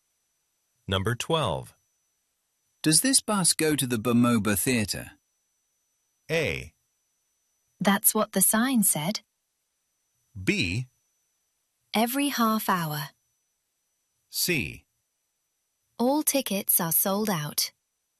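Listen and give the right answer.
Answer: A: That's what the sign said.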